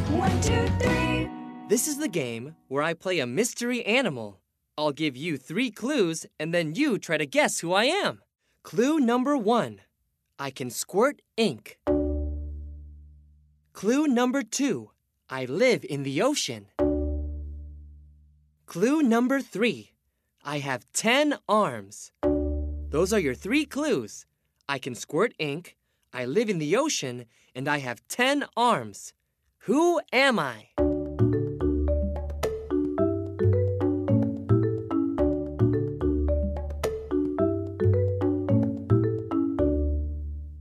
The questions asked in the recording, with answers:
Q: Who am I?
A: I am a squid.